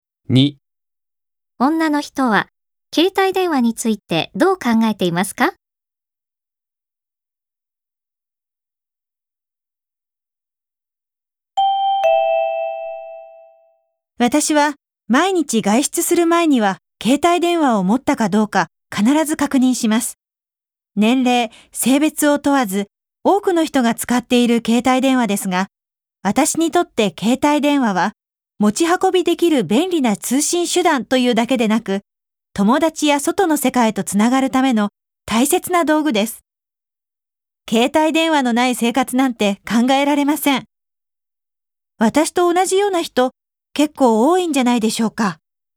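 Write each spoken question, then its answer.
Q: 女の人は携帯電話についてどう考えていますか?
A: 友達や外の世界とつながるための大切な道具で、ない生活は考えられない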